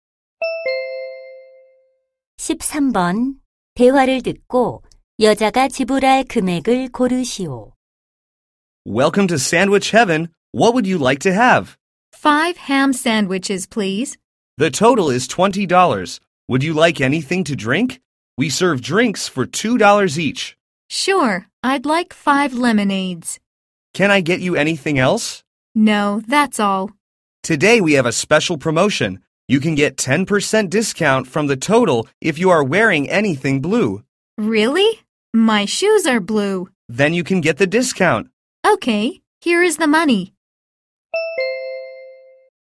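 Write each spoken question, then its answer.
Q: 대화를 듣고 여자가 지불할 금액을 고르시오.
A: 27달러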